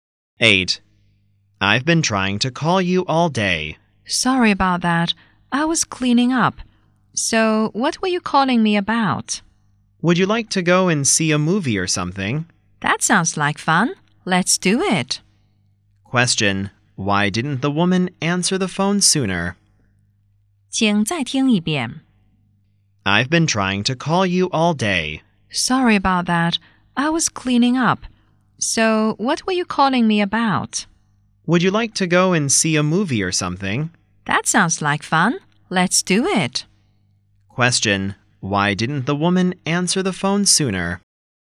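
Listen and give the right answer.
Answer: She was cleaning up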